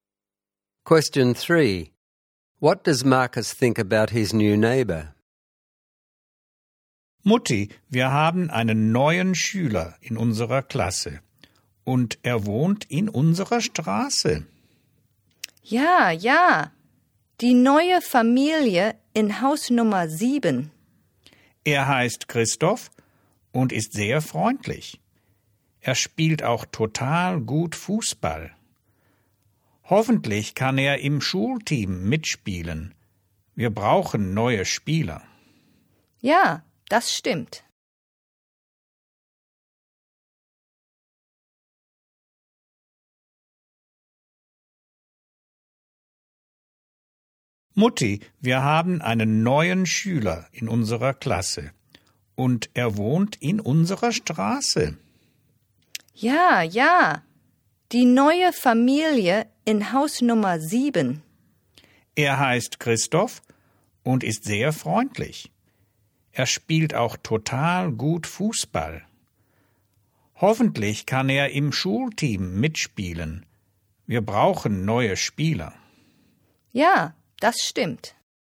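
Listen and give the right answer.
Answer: He is very friendly and plays football really well; hopes he can join the school team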